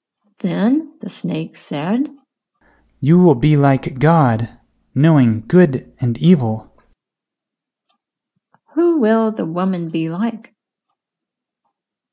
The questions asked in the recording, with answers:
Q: Who will the woman be like?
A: She will be like God.